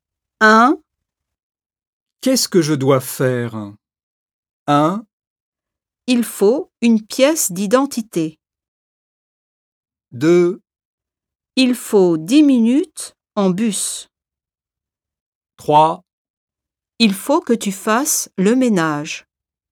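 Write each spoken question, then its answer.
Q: Qu'est-ce que je dois faire?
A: 3: Il faut que tu fasses le ménage.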